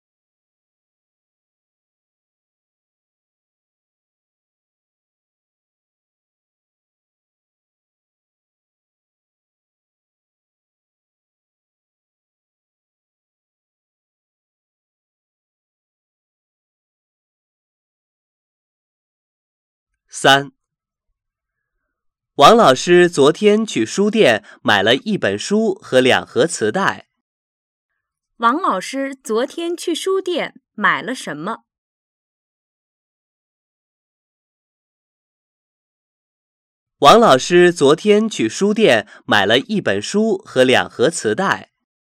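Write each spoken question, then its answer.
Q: 王老师昨天去书店买了什么?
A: 一本书和两盒磁带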